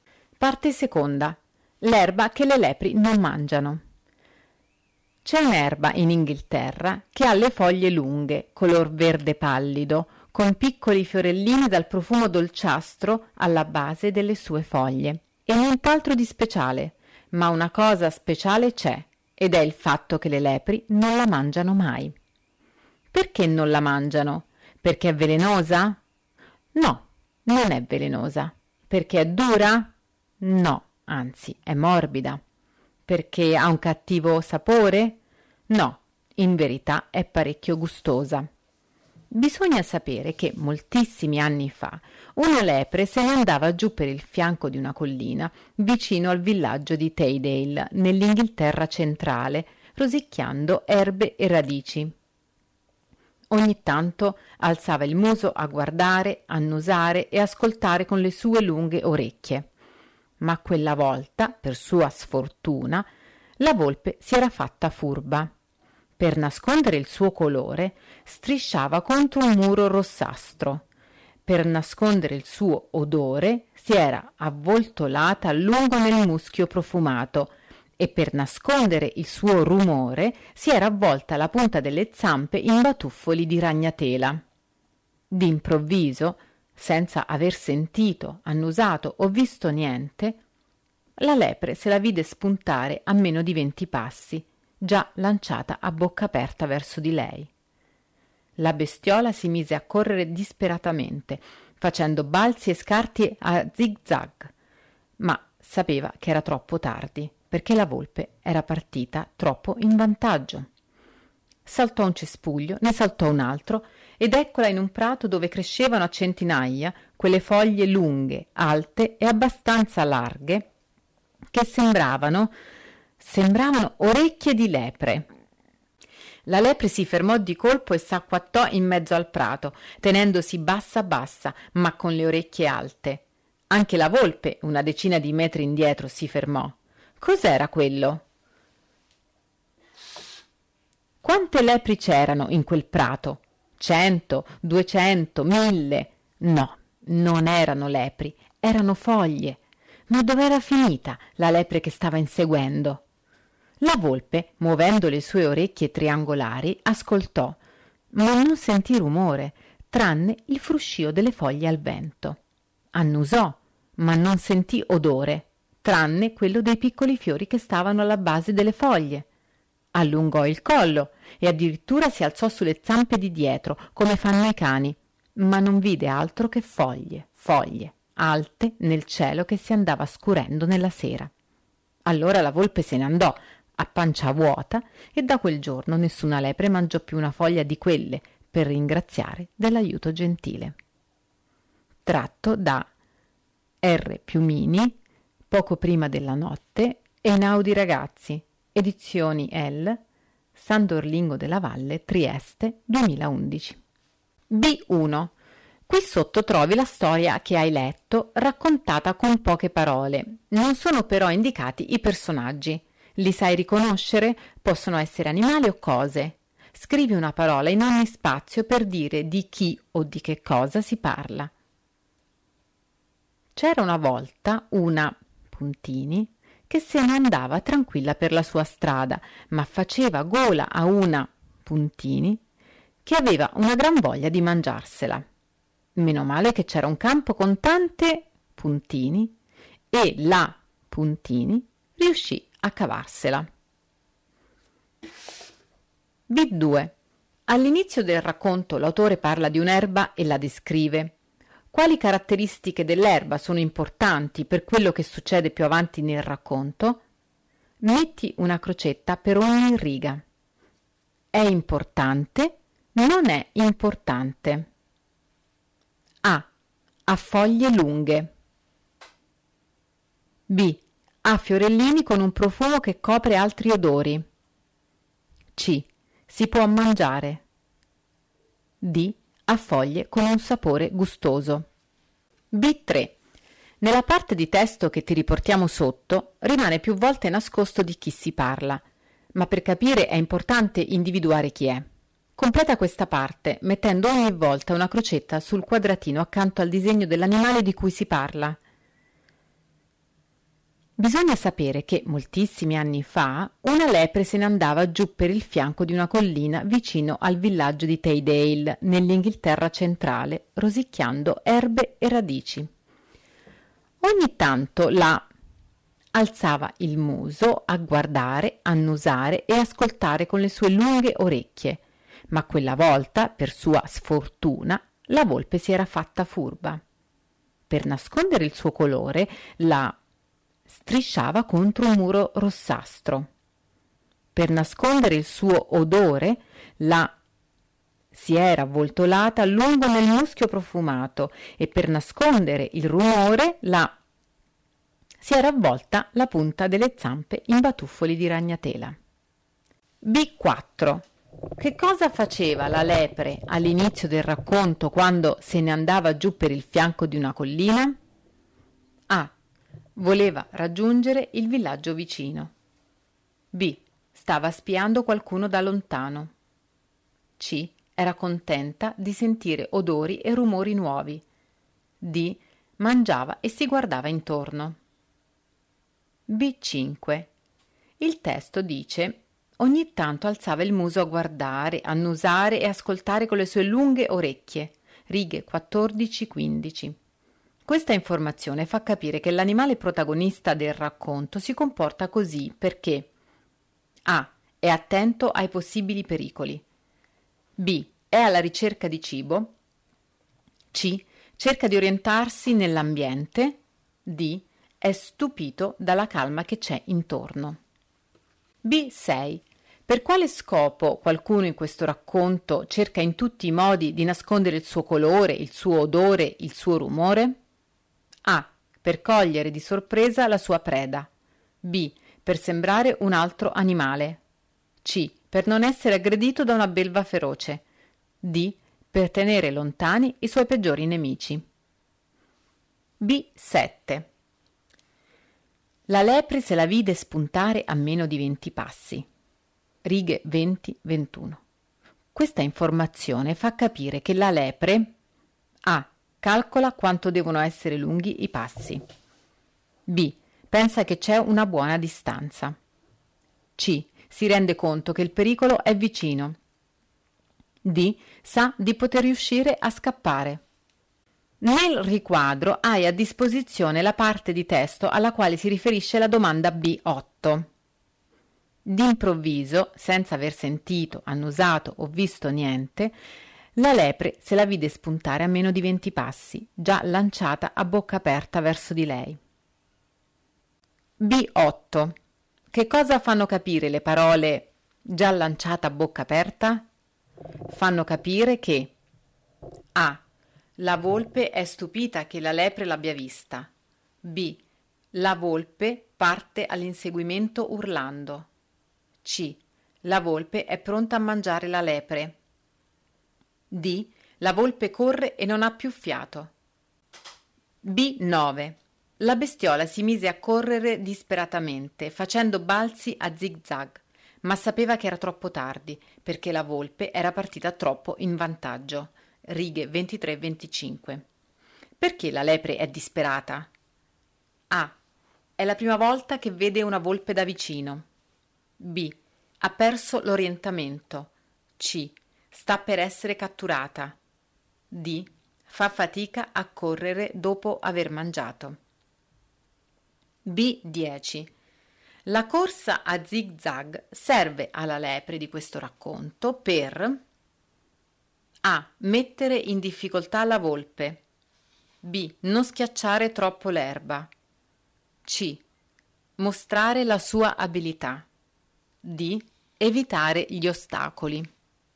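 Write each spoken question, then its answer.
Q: Che cosa faceva la lepre all'inizio del racconto quando se ne andava giù per il fianco di una collina?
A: D: Mangiava e si guardava intorno.

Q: Questa informazione fa capire che l'animale protagonista del racconto si comporta così perché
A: A: è attento ai possibili pericoli.

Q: Per quale scopo qualcuno in questo racconto cerca in tutti i modi di nascondere il suo colore, il suo odore, il suo rumore?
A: A: Per cogliere di sorpresa la sua preda.

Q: Questa informazione fa capire che la lepre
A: C: si rende conto che il pericolo è vicino.

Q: Che cosa fanno capire le parole già lanciata a bocca aperta?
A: C: La volpe è pronta a mangiare la lepre.

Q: Perché la lepre è disperata?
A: C: Sta per essere catturata.

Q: La corsa a zig-zag serve alla lepre di questo racconto per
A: A: Mettere in difficoltà la volpe.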